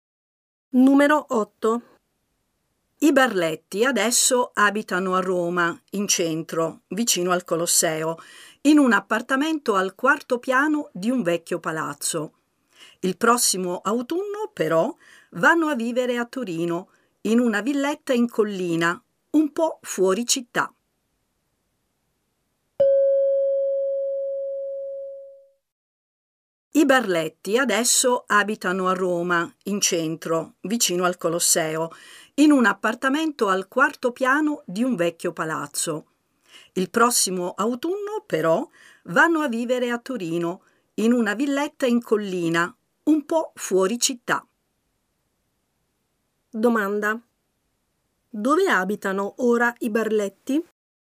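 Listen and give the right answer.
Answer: A Roma, in centro, in un appartamento al quarto piano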